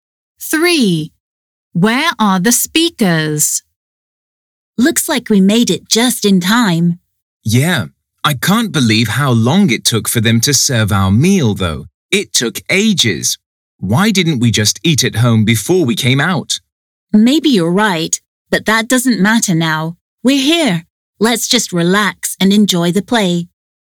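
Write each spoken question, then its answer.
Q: Where are the speakers?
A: At the theatre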